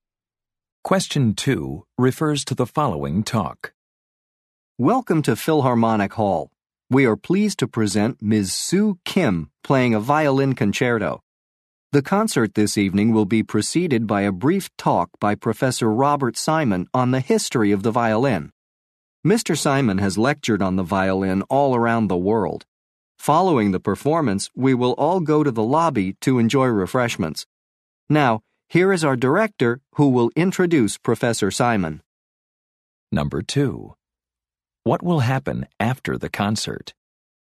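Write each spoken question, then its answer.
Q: What will happen after the concert?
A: Everyone will go to the lobby for refreshments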